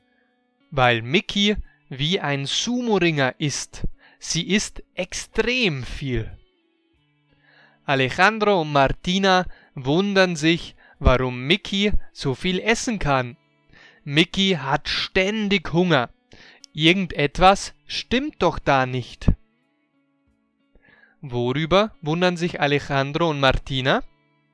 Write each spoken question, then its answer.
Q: Worüber wundern sich Alejandro und Martina?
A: Sie wundern sich, warum Mickey so viel essen kann.